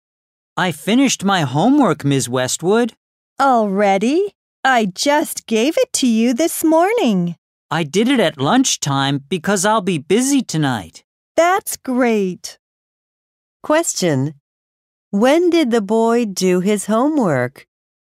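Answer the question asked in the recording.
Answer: At lunchtime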